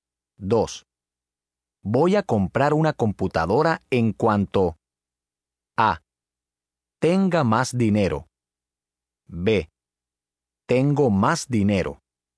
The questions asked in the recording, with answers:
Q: Voy a comprar una computadora en cuanto A. Tenga más dinero. B. Tengo más dinero.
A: A. Voy a comprar una computadora en cuanto tenga más dinero.